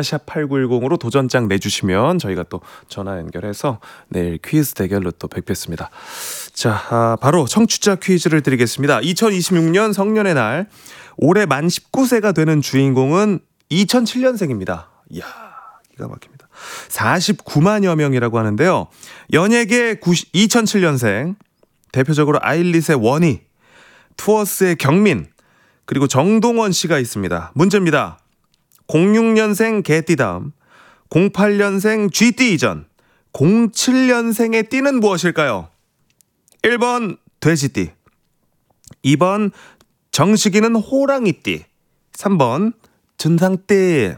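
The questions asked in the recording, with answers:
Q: 06년생 개띠 다음, 08년생 쥐띠 이전, 07년생의 띠는 무엇일까요?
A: 1번: 돼지띠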